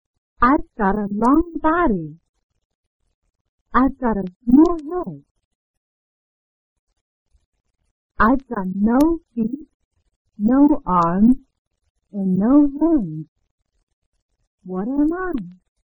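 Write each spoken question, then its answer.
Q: What am I?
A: a snake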